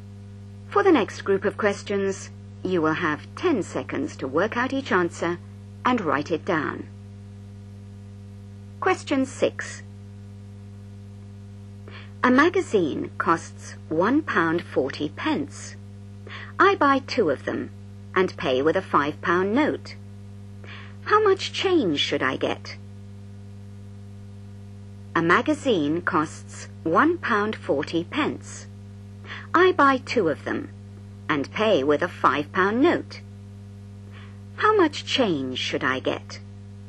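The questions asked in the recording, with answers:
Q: How much change should I get?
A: £2.20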